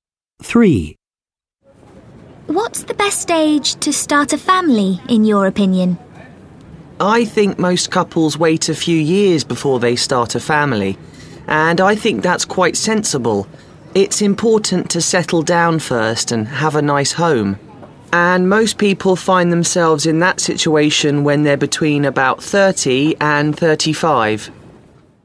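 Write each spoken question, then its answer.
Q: What's the best age to start a family, in your opinion?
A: Between about 30 and 35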